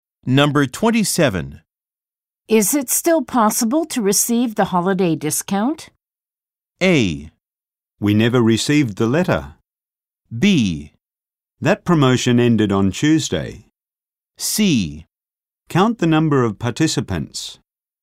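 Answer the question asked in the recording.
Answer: B: That promotion ended on Tuesday.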